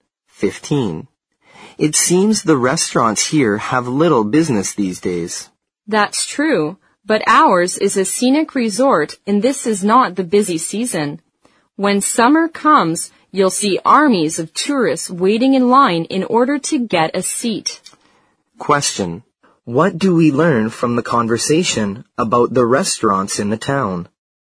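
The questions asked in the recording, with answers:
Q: What do we learn from the conversation about the restaurants in the town?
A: They have little business now but are crowded in summer, the busy tourist season.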